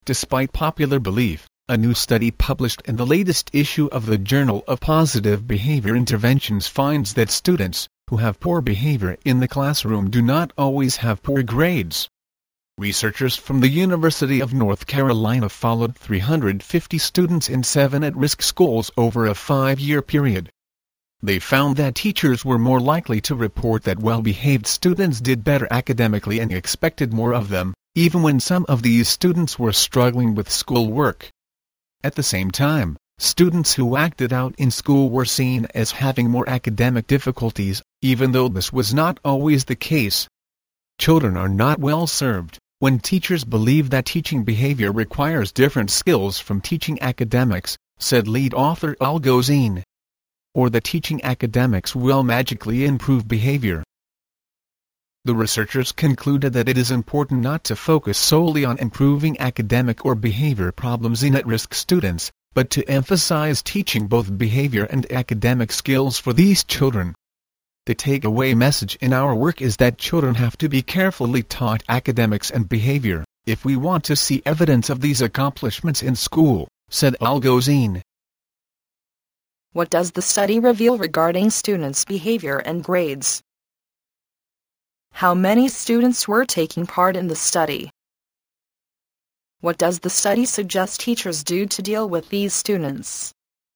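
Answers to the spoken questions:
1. Students who behave poorly in class do not always have poor grades.
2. 350
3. Carefully teach them both behavior and academic skills.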